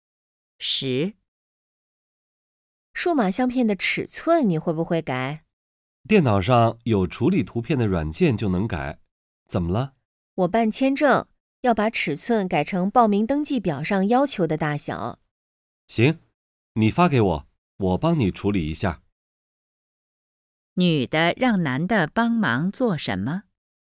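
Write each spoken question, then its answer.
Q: 女的让男的帮忙做什么?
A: 修改数码相片的尺寸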